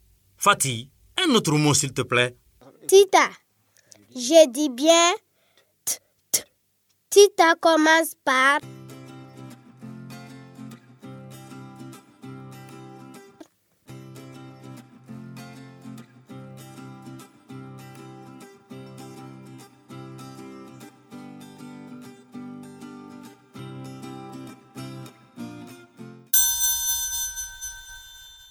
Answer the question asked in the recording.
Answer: Bravo les élèves. Tita commence par T.